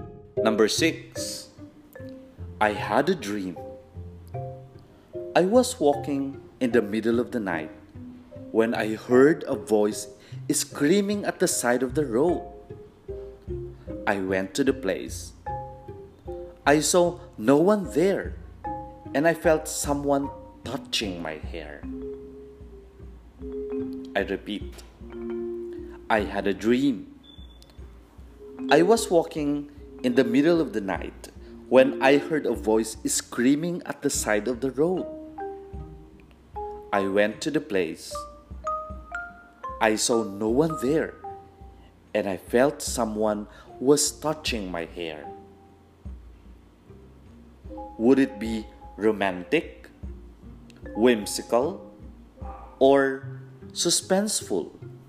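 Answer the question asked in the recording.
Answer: suspenseful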